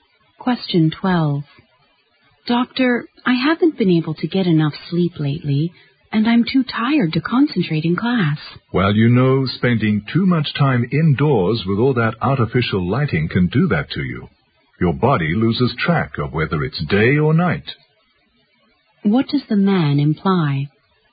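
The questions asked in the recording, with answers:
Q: What does the man imply?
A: Spending too much time indoors under artificial light may be causing the woman's sleep problems.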